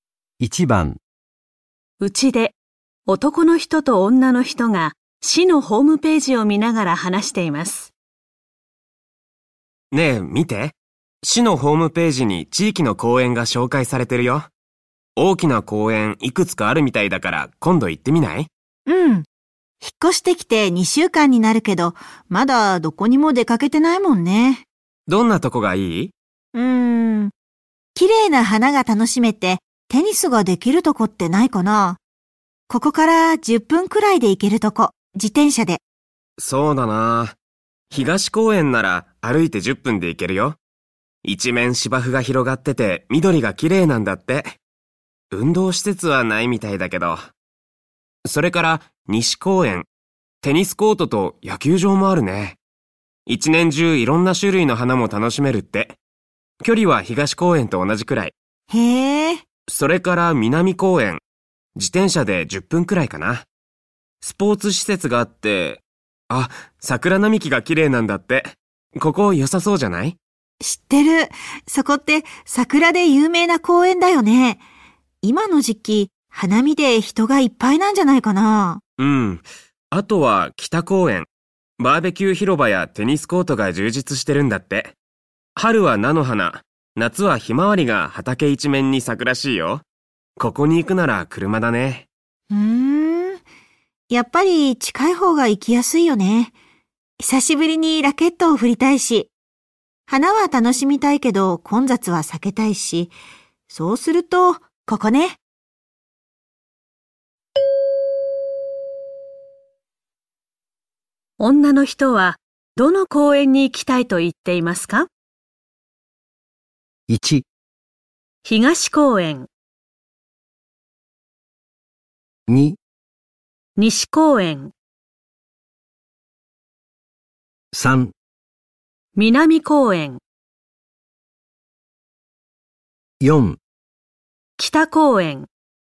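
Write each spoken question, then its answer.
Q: 女の人はどの公園に行きたいと言っていますか?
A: 2: 西公園。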